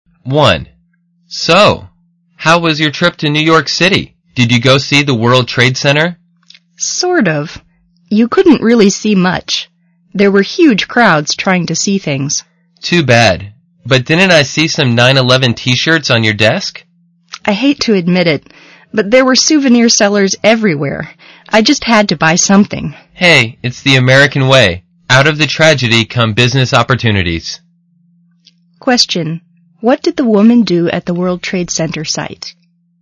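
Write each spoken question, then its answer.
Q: What did the woman do at the World Trade Center site?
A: She bought souvenirs (9/11 t-shirts) from sellers there.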